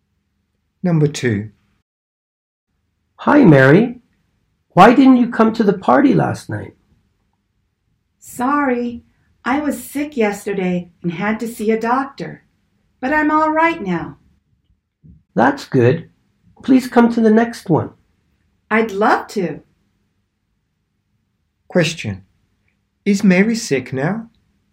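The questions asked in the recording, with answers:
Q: Question. Is Mary sick now?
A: No, she is all right now.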